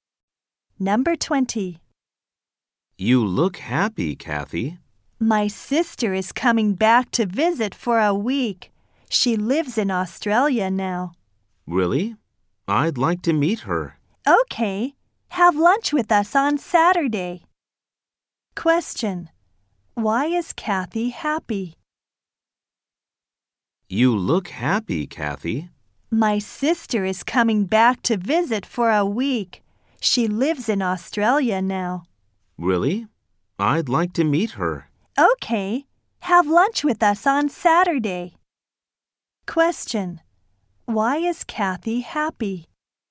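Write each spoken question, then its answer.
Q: Why is Kathy happy?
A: Her sister is coming back to visit for a week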